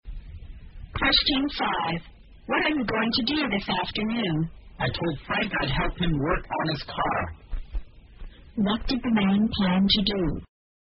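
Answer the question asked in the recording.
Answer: Help Frank work on his car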